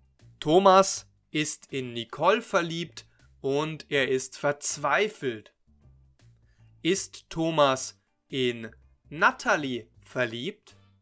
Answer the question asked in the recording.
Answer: Nein, Thomas ist nicht in Natalie verliebt.